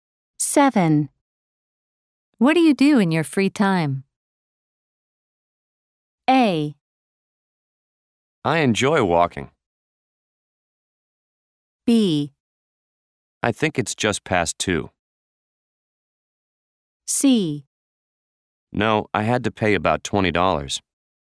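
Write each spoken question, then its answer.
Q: What do you do in your free time?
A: A: I enjoy walking.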